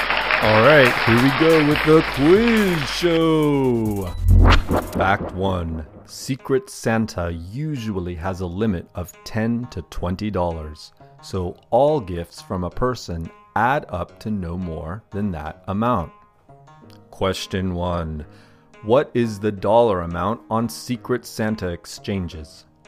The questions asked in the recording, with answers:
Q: what is the dollar amount on Secret Santa exchanges?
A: Secret Santa usually has a limit of $10 to $20